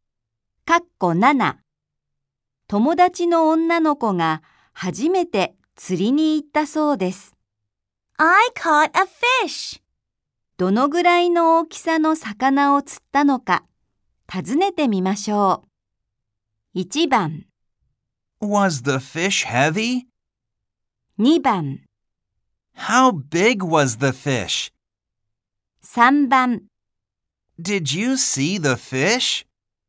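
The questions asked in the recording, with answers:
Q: どのぐらいの大きさの魚を釣ったのか、尋ねてみましょう。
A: 2: How big was the fish?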